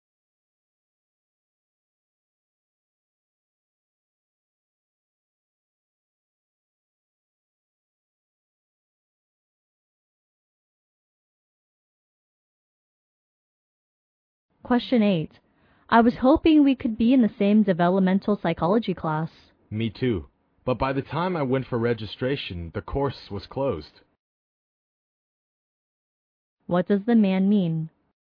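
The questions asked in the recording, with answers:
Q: What does the man mean?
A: The course was already closed when he went to register.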